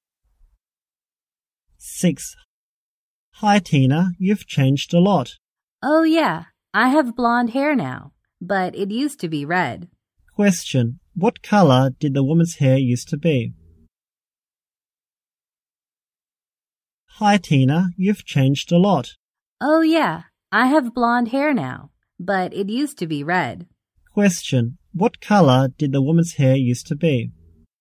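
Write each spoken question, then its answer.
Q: What color did the woman's hair used to be?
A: Red.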